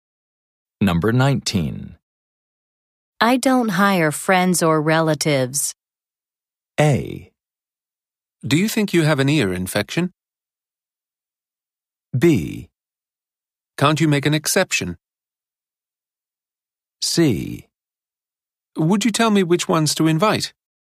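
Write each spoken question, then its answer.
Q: I don't hire friends or relatives.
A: B: Can't you make an exception?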